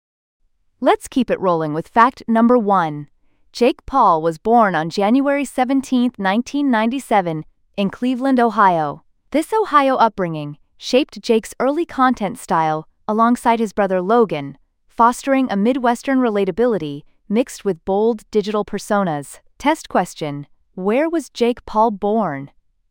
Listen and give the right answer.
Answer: Cleveland, Ohio.